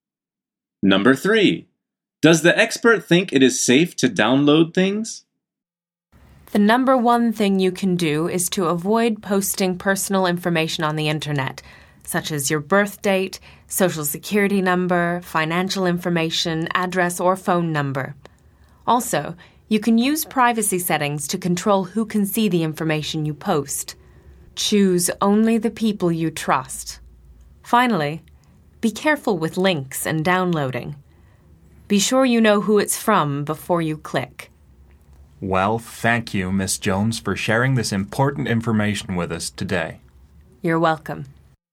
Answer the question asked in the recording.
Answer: The answer is only if you know who it is from.